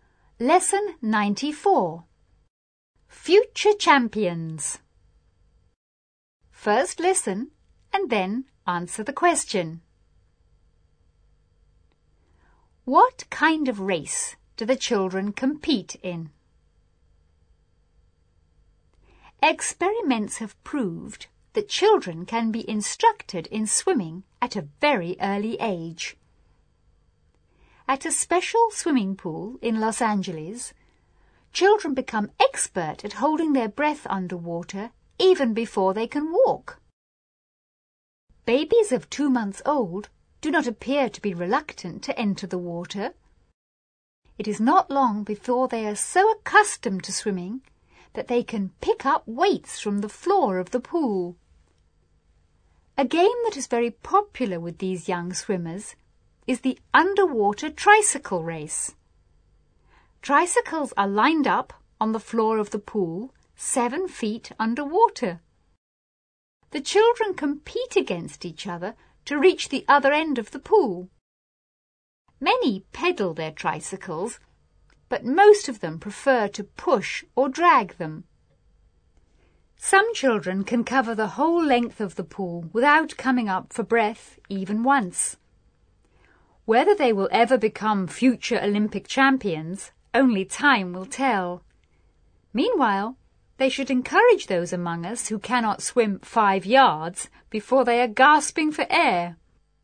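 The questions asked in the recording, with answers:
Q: What kind of race do the children compete in?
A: An underwater tricycle race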